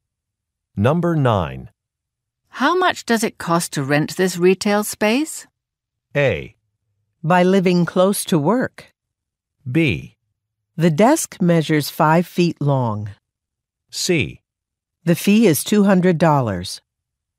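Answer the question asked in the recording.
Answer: C: The fee is $200.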